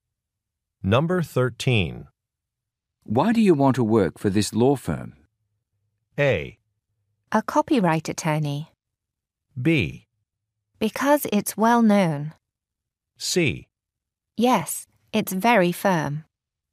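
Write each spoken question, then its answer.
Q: Why do you want to work for this law firm?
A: B: Because it's well known.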